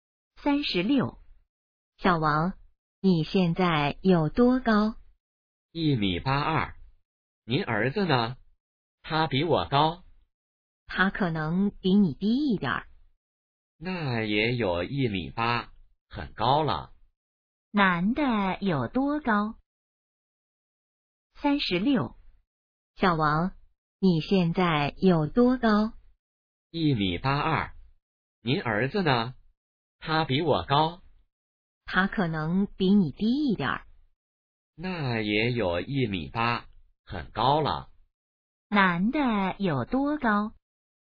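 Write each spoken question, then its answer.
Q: 男的有多高?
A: 1.82米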